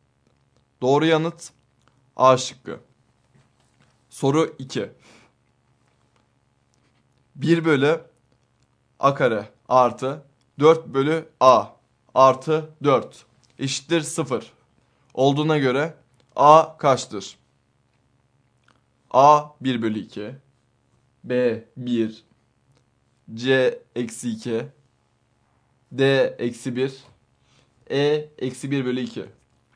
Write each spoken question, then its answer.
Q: 1 bölü A kare artı 4 bölü A artı 4 eşittir 0 olduğuna göre A kaçtır?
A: Doğru yanıt E şıkkı.